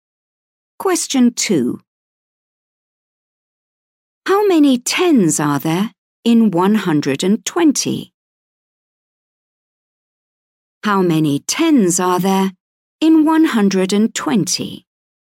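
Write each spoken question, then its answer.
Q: How many tens are there in 120?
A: 12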